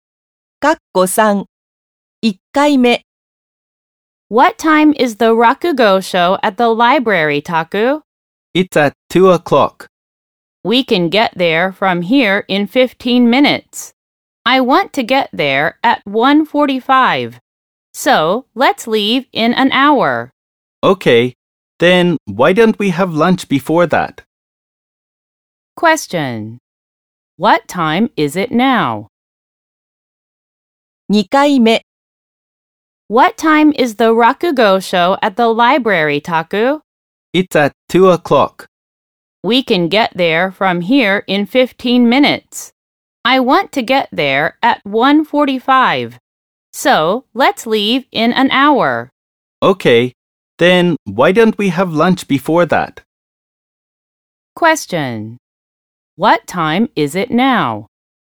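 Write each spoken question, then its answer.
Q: What time is it now?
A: 12:30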